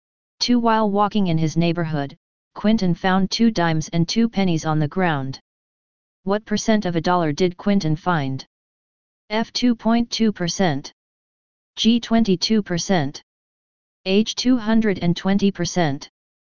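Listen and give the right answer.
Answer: G: 22%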